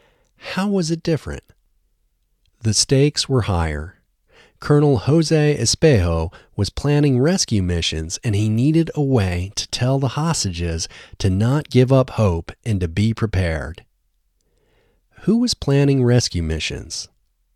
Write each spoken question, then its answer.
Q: Who was planning rescue missions?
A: Colonel Jose Espejo was planning rescue missions.